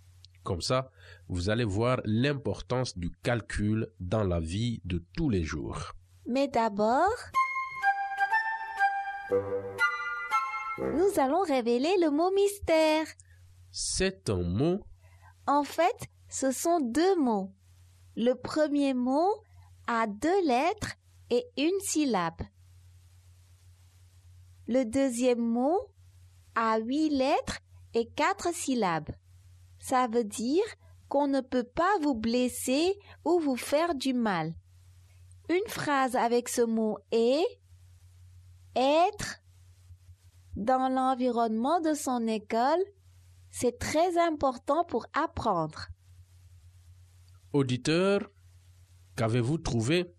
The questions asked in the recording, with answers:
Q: Auditeur, qu'avez-vous trouvé?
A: Le mot mystère est « en sécurité ».